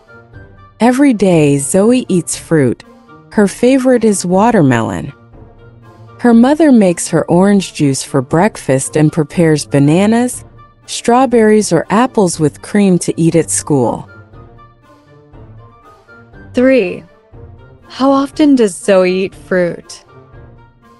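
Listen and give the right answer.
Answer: Every day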